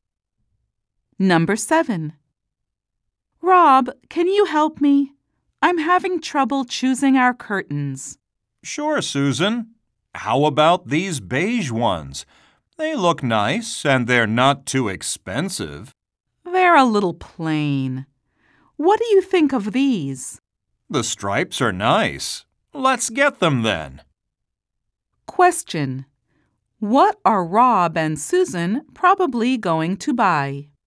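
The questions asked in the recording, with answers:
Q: What are Rob and Susan probably going to buy?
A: Striped curtains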